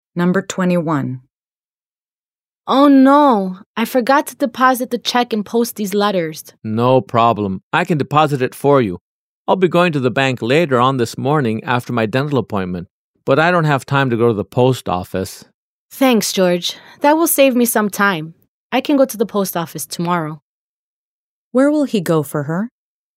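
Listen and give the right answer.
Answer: To the bank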